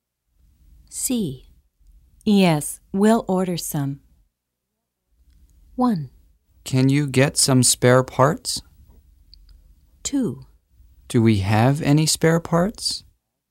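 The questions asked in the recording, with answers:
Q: Yes, we'll order some.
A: 1: Can you get some spare parts?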